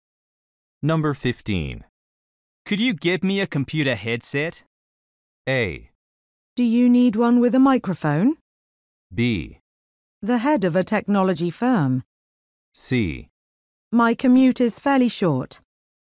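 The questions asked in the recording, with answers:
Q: Could you get me a computer headset?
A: A: Do you need one with a microphone?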